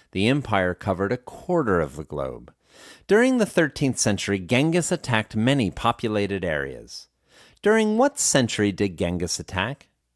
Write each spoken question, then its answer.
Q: During what century did Genghis attack?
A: He attacked during the 13th century.